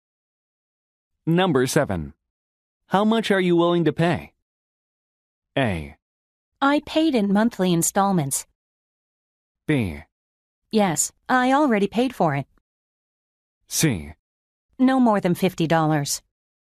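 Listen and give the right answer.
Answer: C: No more than $50.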